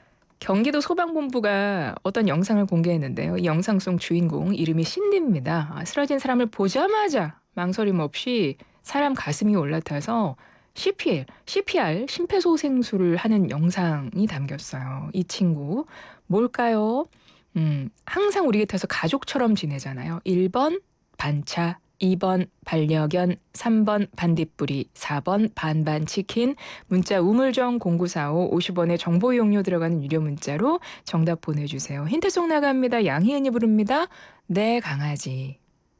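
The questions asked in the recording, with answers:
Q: 이 친구, 뭘까요?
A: 2: 반려견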